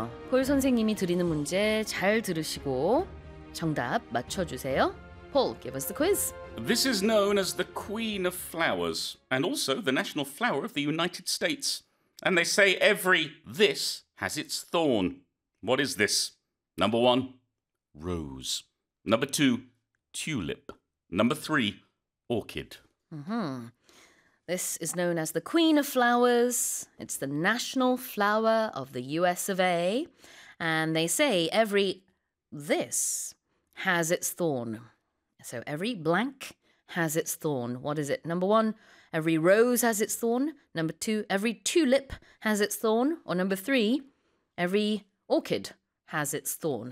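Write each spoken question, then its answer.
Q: What is this?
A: 1: rose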